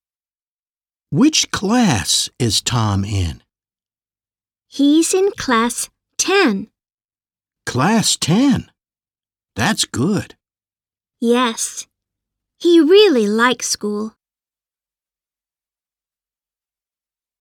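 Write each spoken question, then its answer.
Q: Which class is Tom in?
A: 10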